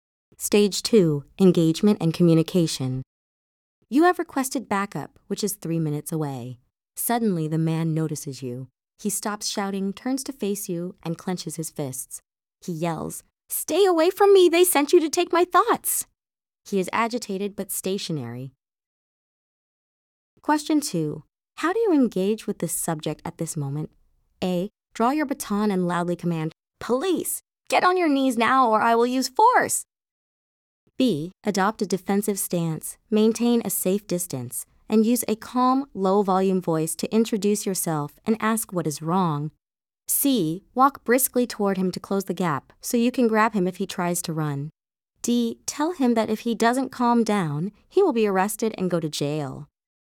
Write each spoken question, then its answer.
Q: How do you engage with this subject at this moment?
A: The correct answer is B.